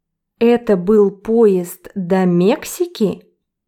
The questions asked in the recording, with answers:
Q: Это был поезд до Мексики?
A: Нет, это был поезд до России, до Москвы.